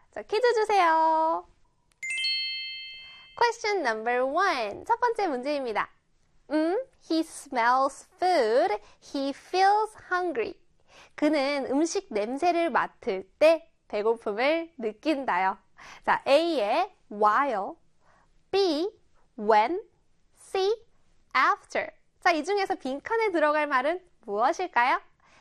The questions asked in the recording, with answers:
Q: 자, 이 중에서 빈칸에 들어갈 말은 무엇일까요?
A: 맞습니다. B에 when이 들어가야겠죠.